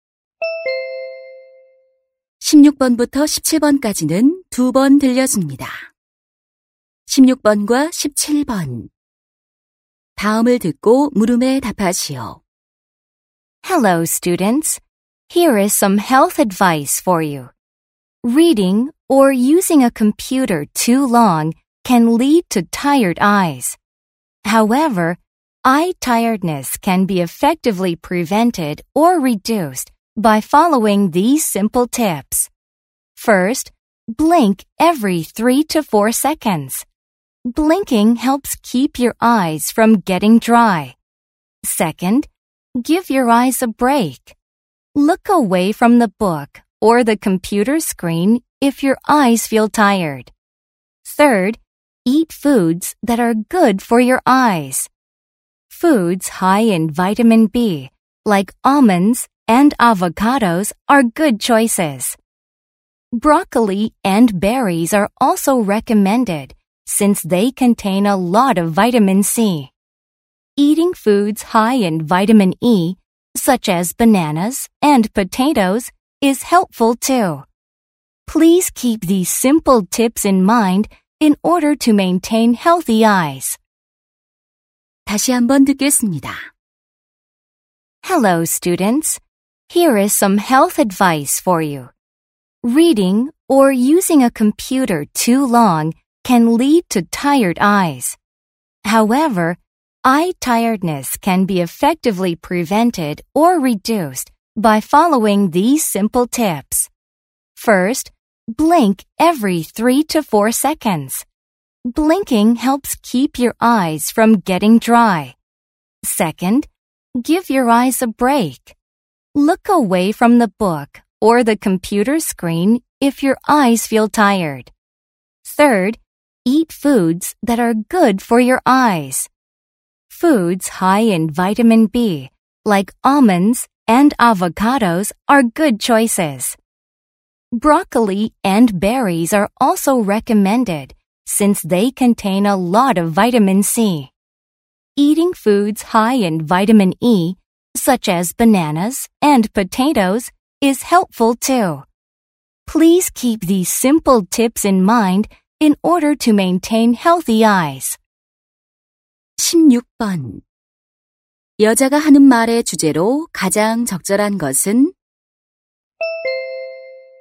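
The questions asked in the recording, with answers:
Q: 여자가 하는 말의 주제로 가장 적절한 것은?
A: 눈의 피로를 예방하거나 줄이는 방법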